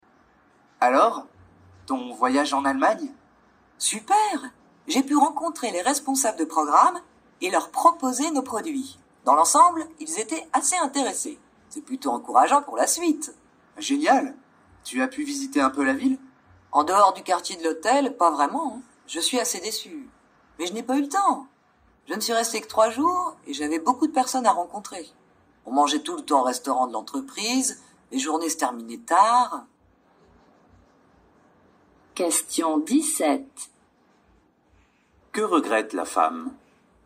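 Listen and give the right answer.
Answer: De ne pas avoir pu visiter la ville (faute de temps)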